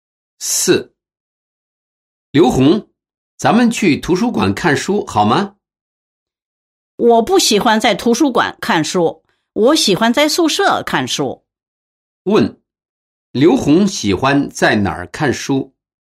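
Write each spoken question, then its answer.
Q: 刘红喜欢在哪儿看书?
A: 宿舍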